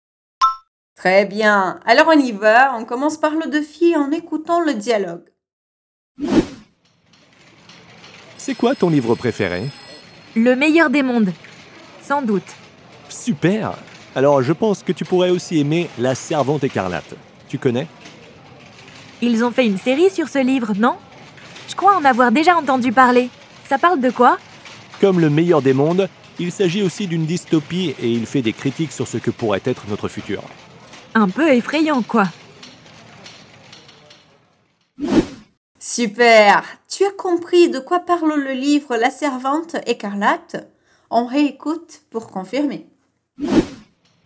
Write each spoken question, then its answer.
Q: Tu as compris de quoi parle le livre La Servante Écarlate?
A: Comme le meilleur des mondes, il s'agit aussi d'une dystopie et il fait des critiques sur ce que pourrait être notre futur.